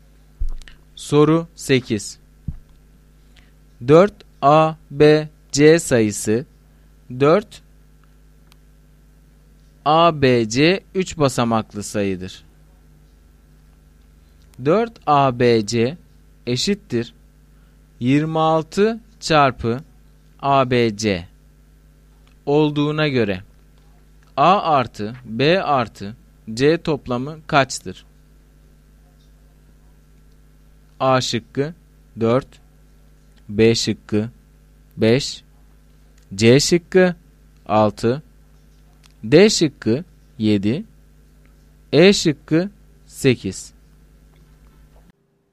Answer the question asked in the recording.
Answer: Doğru cevap D şıkkı.